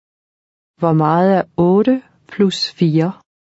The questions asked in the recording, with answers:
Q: Hvor meget er 8 plus 4?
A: 12. 12.